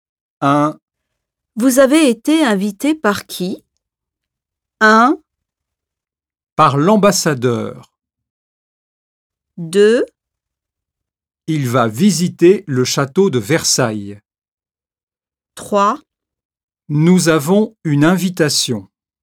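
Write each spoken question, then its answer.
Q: Vous avez été invité par qui?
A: 1: Par l'ambassadeur.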